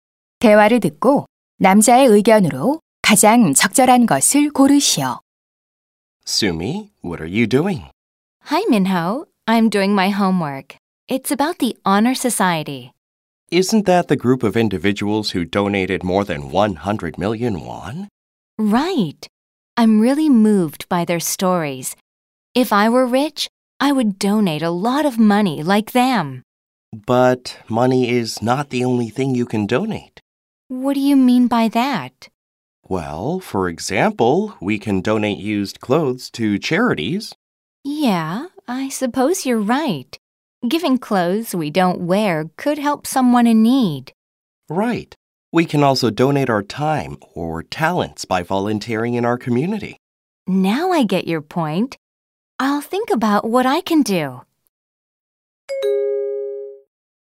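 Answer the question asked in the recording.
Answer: 돈 말고도 옷, 시간, 재능 등 다양한 것을 기부할 수 있다.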